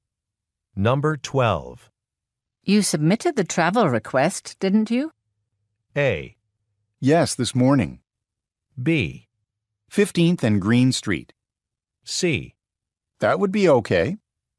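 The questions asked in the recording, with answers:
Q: You submitted the travel request, didn't you?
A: A: Yes, this morning.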